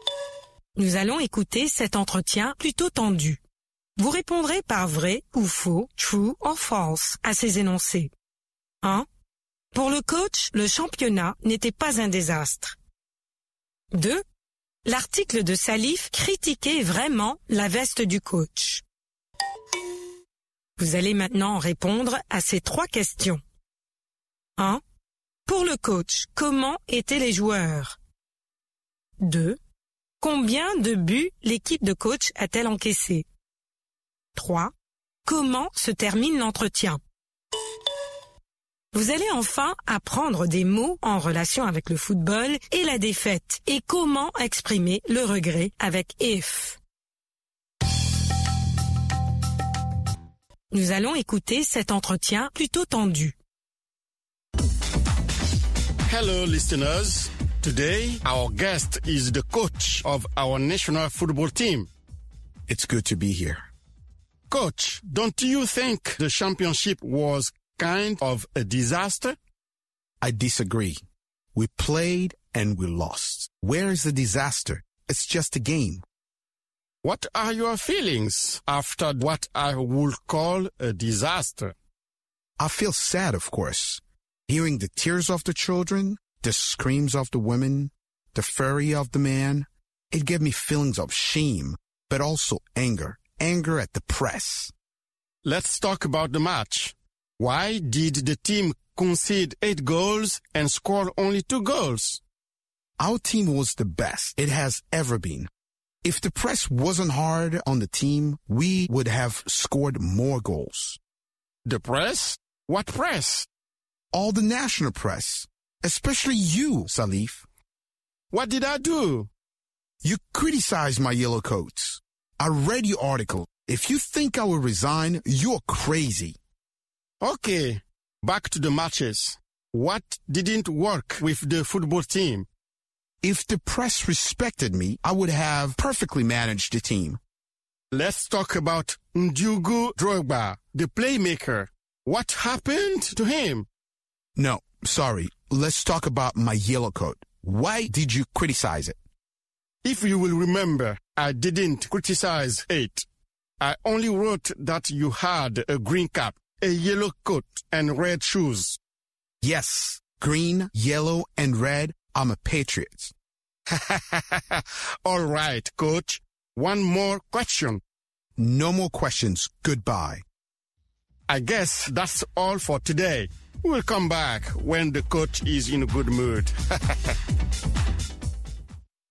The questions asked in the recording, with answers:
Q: Pour le coach, le championnat n'était pas un désastre.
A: L'énoncé 1 est vrai.

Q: L'article de Salif critiquait vraiment la veste du coach.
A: L'énoncé 2 est faux.

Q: Pour le coach, comment étaient les joueurs?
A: Ils étaient les meilleurs.

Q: Combien de buts l'équipe de coach a-t-elle encaissé?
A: 8 buts.

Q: Comment se termine l'entretien?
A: Le coach l'arrête.